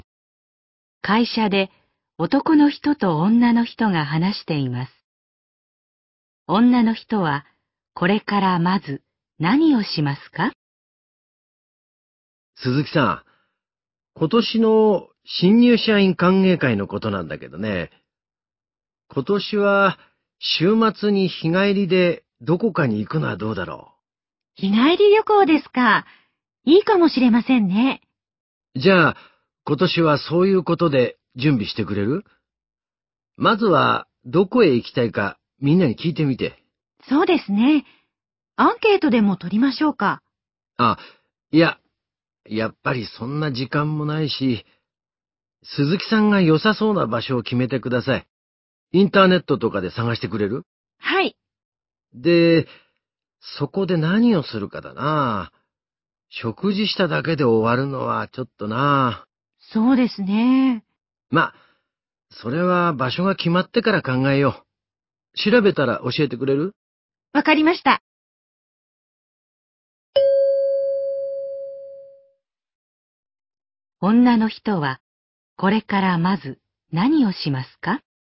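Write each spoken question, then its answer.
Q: 女の人はこれからまず何をしますか?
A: インターネットで日帰り旅行の良さそうな場所を探す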